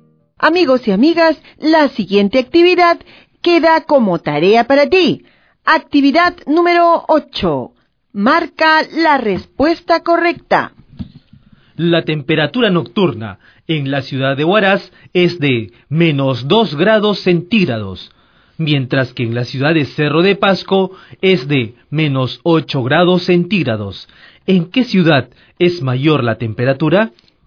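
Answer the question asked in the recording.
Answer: En Huaraz (−2 °C)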